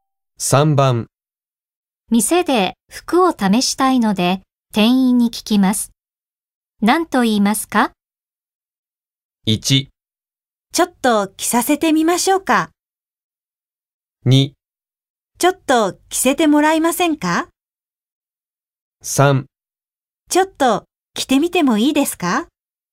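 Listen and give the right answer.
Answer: 3: ちょっと着てみてもいいですか。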